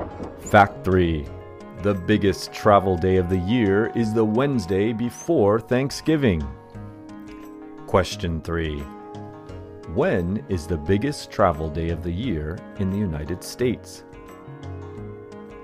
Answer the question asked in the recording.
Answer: The biggest travel day of the year is the Wednesday before Thanksgiving.